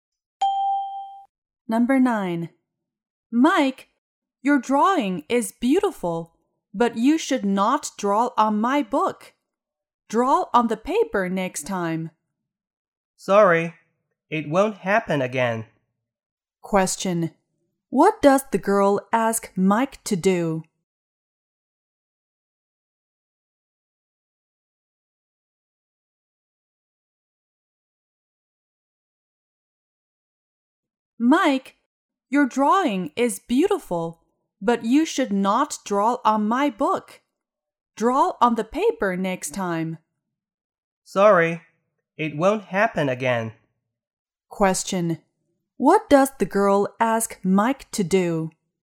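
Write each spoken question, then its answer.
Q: What does the girl ask Mike to do?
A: Draw on the paper next time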